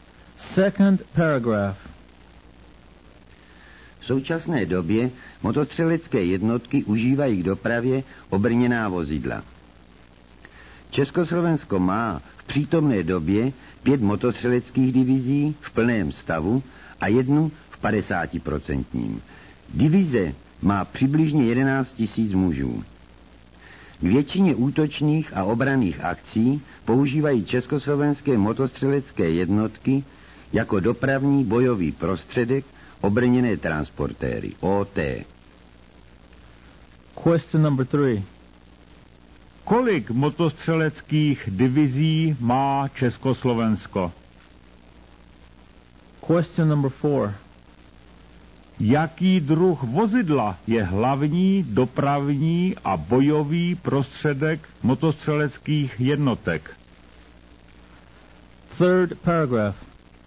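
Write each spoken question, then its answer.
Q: Kolik motostřeleckých divizí má Československo?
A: 5 v plném stavu a jednu v 50%

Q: Jaký druh vozidla je hlavní dopravní a bojový prostředek motostřeleckých jednotek?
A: obrněné transportéry OT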